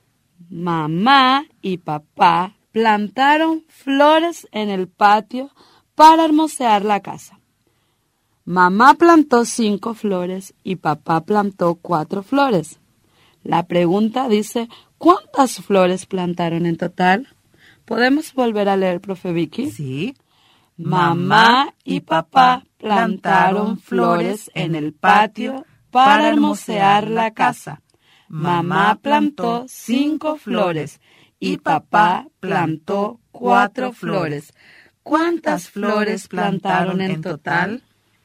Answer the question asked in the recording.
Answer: Respuesta, plantaron en total 9 flores.